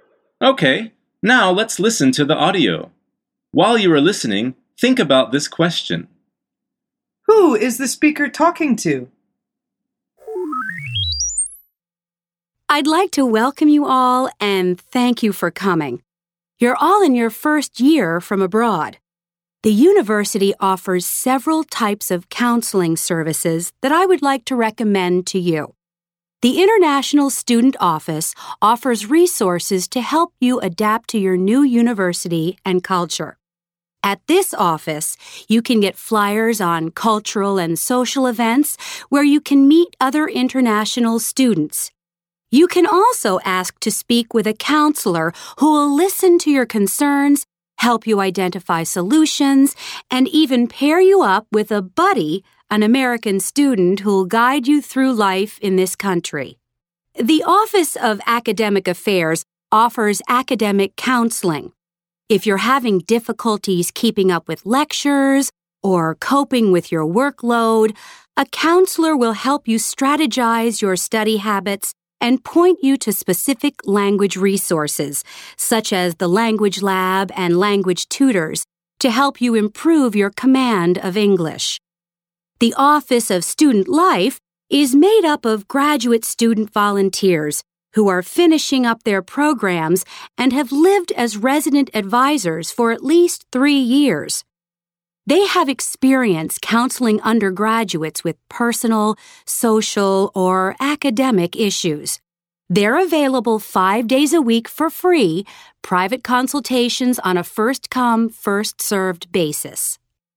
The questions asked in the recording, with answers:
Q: Who is the speaker talking to?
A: The answer is first-year international students.